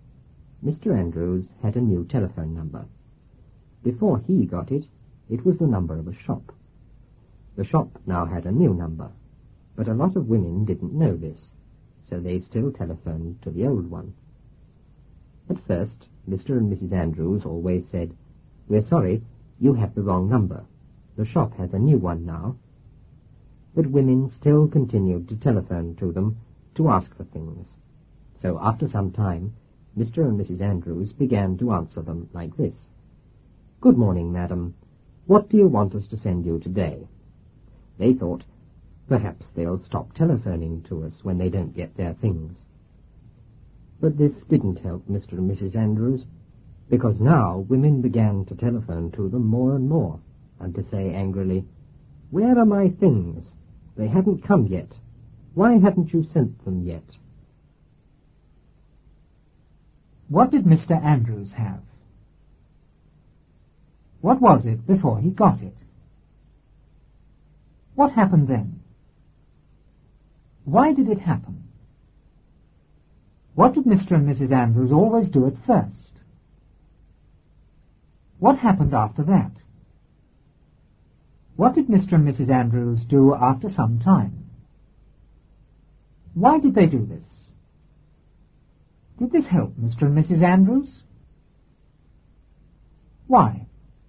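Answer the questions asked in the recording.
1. A new telephone number
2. The number of a shop
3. Women still telephoned the old number because they didn't know the shop had a new one
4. They said, "We're sorry, you have the wrong number. The shop has a new one now."
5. Women still continued to telephone them to ask for things
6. They answered, "Good morning, madam. What do you want us to send you today?"
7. They thought the women would stop calling when they didn't get their things; it didn't help, because women called more and more, angrily asking where their things were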